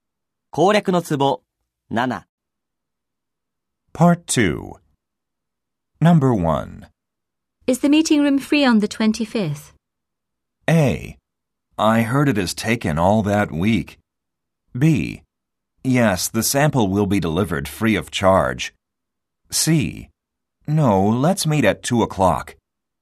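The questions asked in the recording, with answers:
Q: Is the meeting room free on the 25th?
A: A: I heard it is taken all that week.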